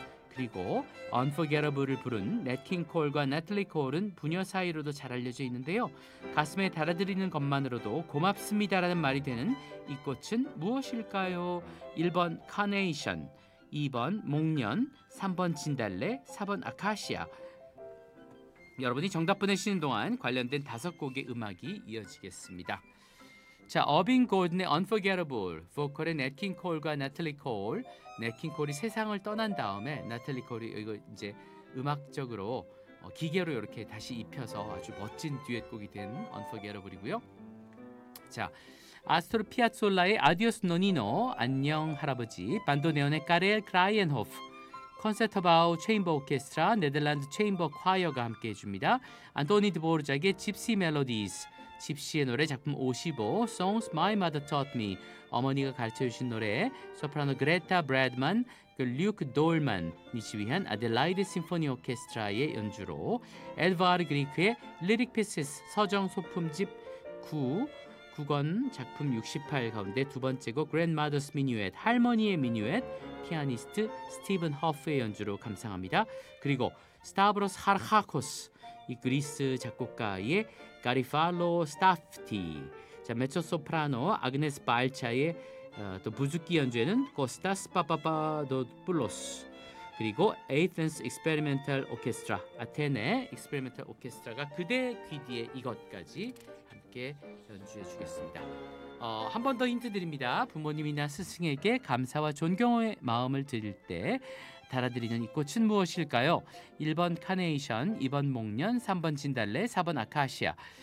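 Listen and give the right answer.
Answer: 1: 카네이션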